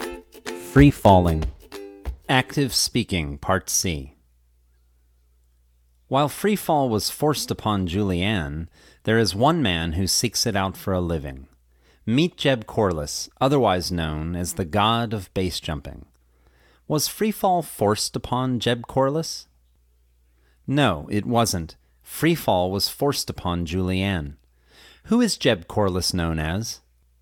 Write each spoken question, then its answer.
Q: Who is Jeb Corliss known as?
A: Jeb Corliss is known as the god of base jumping.